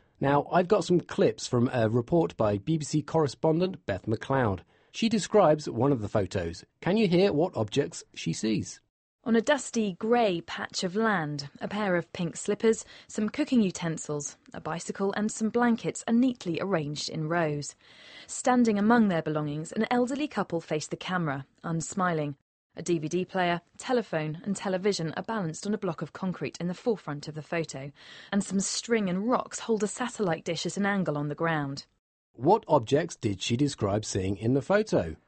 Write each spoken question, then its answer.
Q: What objects did she describe seeing in the photo?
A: A pair of slippers.